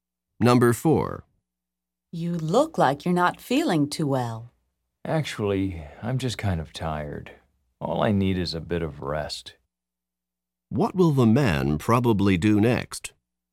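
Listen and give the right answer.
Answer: Get some rest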